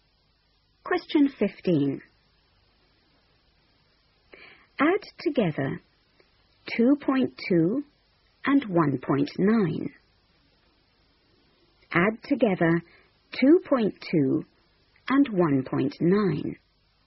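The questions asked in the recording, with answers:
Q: Add together 2.2 and 1.9.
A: 4.1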